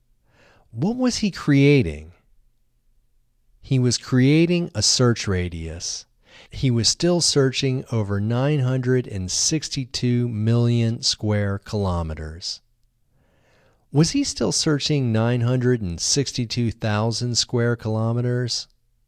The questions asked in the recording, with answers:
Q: Was he still searching 962,000 square kilometers?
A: No, he wasn't still searching 962,000 kilometers.